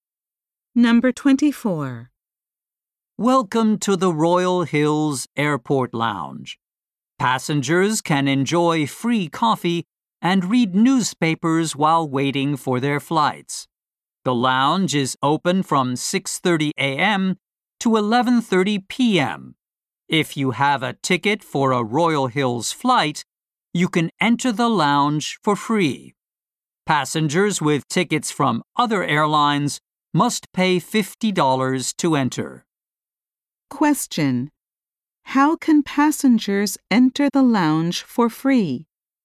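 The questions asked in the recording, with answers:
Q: How can passengers enter the lounge for free?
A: By having a Royal Hills flight ticket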